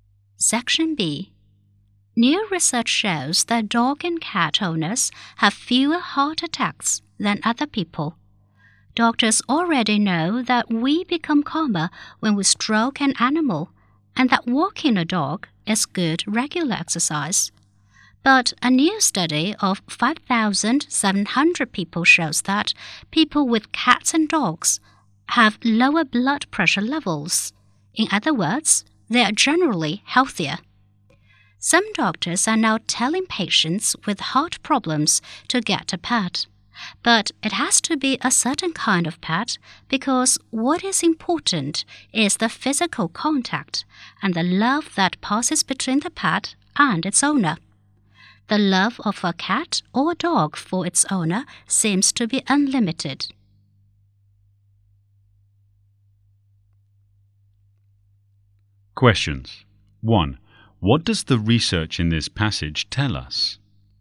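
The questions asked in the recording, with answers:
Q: What does the research in this passage tell us?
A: Dog and cat owners have fewer heart attacks and lower blood pressure; they are generally healthier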